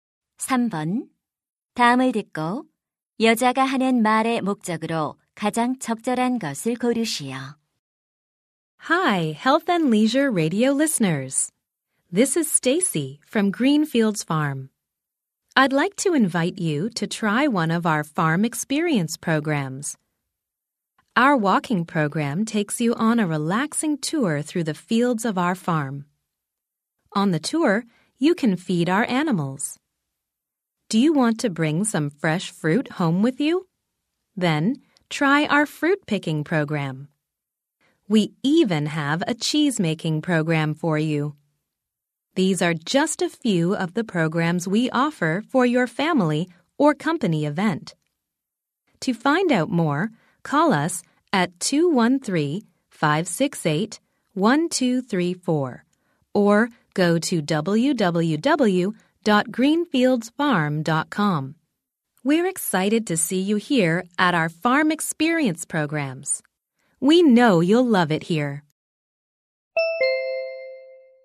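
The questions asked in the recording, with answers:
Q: 다음을 듣고 여자가 하는 말의 목적으로 가장 적절한 것을 고르시오.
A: 농장 체험 프로그램을 홍보하려고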